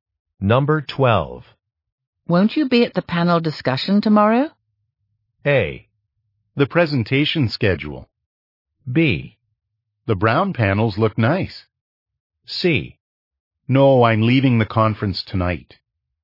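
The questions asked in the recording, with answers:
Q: Won't you be at the panel discussion tomorrow?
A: C: No, I'm leaving the conference tonight.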